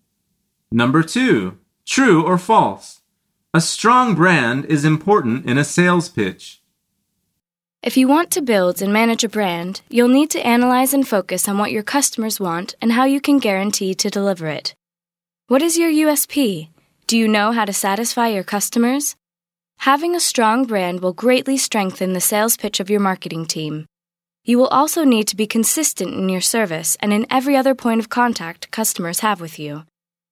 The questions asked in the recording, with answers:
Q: A strong brand is important in a sales pitch.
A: The answer is true.